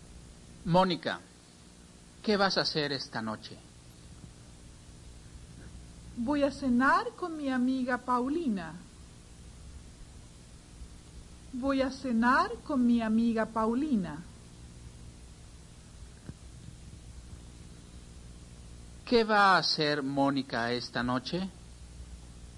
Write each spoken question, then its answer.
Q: ¿Qué va a hacer Mónica esta noche?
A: Mónica va a cenar con su amiga Paulina.